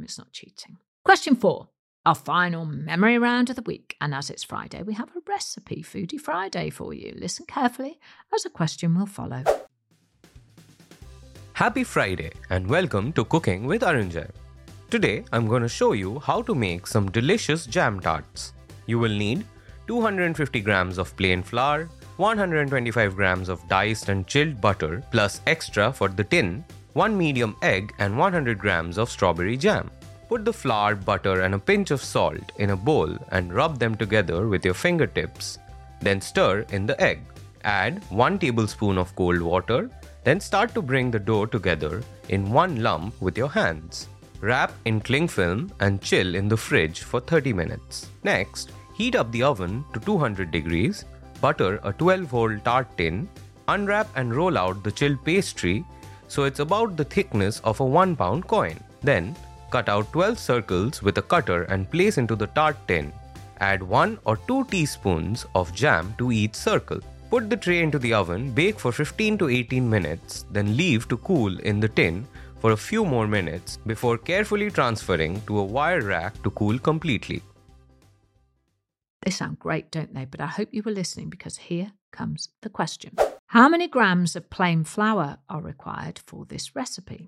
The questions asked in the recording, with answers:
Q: How many grams of plain flour are required for this recipe?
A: The answer is 250 grams of plain flour.